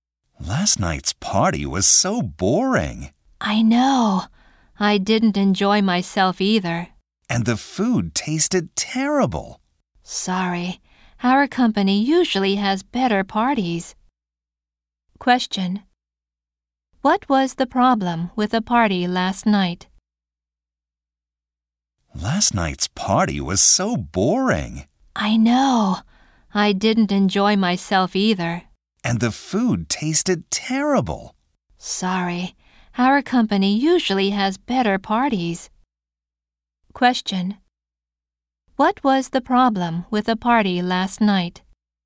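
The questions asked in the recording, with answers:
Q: What was the problem with the party last night?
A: It was boring and the food tasted terrible.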